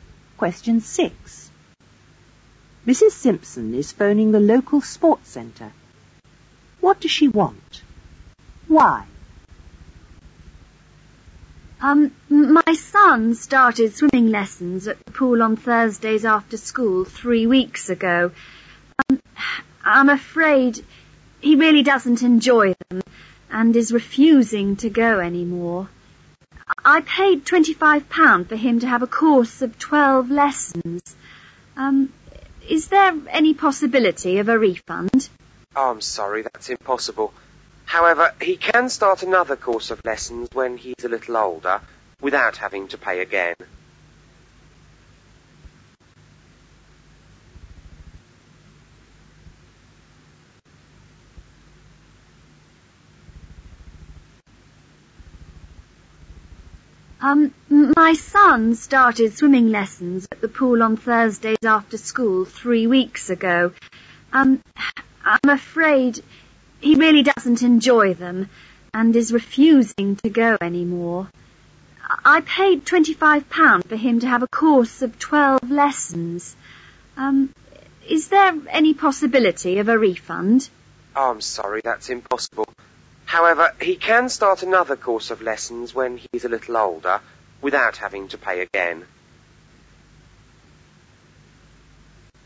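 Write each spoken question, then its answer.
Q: What does she want? Why?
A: A refund, because her son doesn't enjoy the swimming lessons and refuses to go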